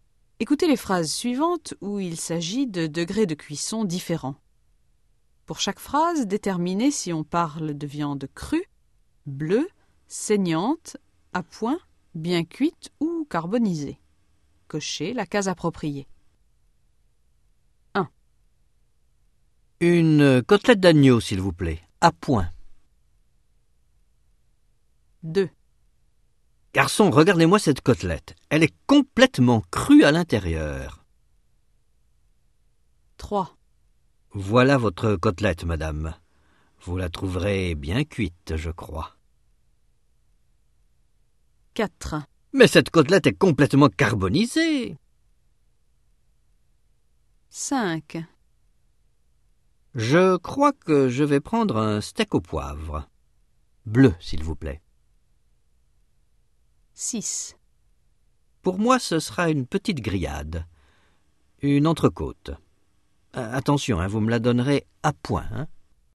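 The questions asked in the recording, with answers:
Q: Une côtelette d'agneau, s'il vous plaît, à point.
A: à point

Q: Garçon, regardez-moi cette côtelette. Elle est complètement crue à l'intérieur.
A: crue

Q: Voilà votre côtelette, madame. Vous la trouverez bien cuite, je crois.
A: bien cuite

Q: Mais cette côtelette est complètement carbonisée.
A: carbonisée

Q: Je crois que je vais prendre un steak au poivre. Bleu, s'il vous plaît.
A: bleue

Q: Pour moi, ce sera une petite grillade, une entrecôte. Attention, hein, vous me la donnerez à point, hein.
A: à point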